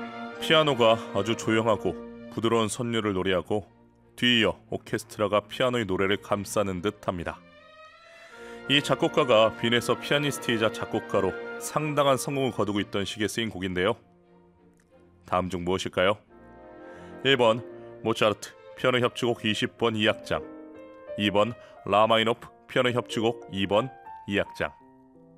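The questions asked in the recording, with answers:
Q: 다음 중 무엇일까요? 1번 모차르트 피아노 협주곡 20번 2악장, 2번 라마이노프 피아노 협주곡 2번 2악장.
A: 1: 모차르트 피아노 협주곡 20번 2악장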